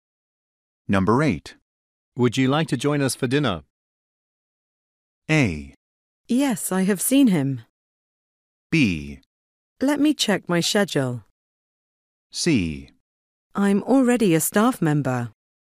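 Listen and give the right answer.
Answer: B: Let me check my schedule.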